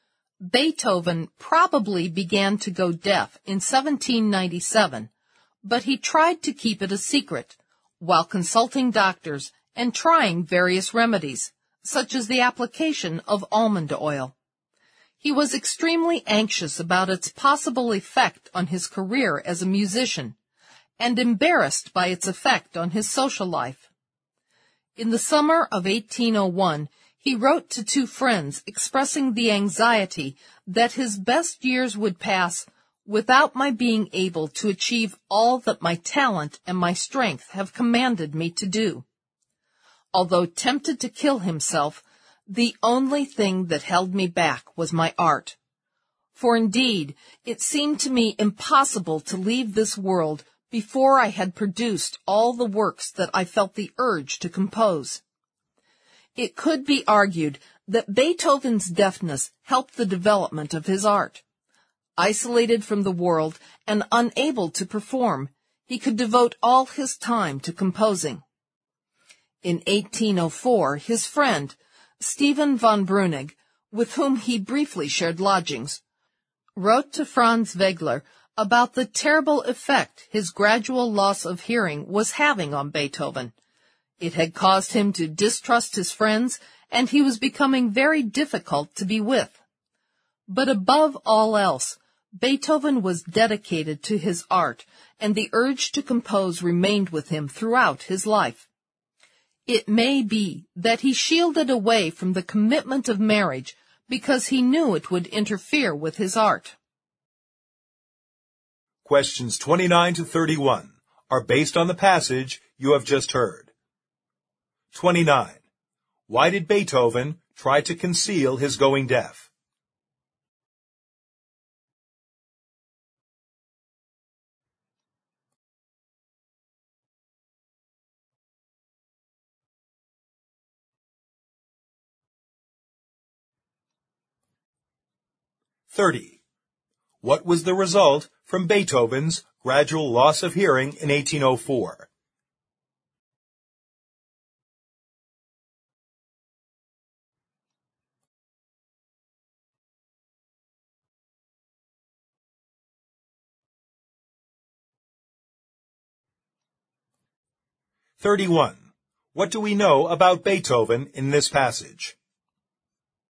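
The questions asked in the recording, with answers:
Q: Why did Beethoven try to conceal his going deaf?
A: He was anxious about its effect on his career as a musician and embarrassed by its effect on his social life.

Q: What was the result from Beethoven's gradual loss of hearing in 1804?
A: He came to distrust his friends and became very difficult to be with.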